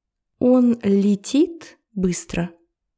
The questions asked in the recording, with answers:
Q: Он летит быстро?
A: Нет, он бежит. Он бежит очень быстро.